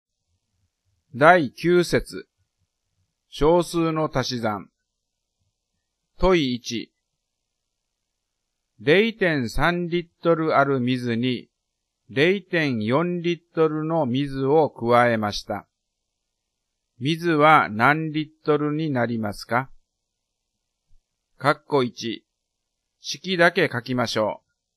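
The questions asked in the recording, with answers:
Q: 水は何リットルになりますか?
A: 0.7リットル(0.3+0.4)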